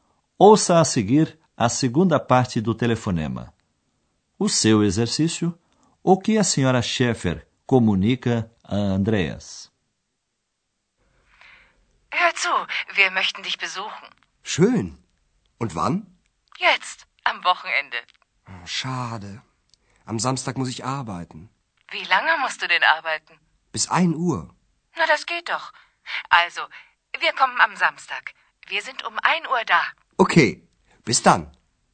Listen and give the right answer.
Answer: A mãe de Andreas comunica que eles irão lá no sábado a uma hora da tarde.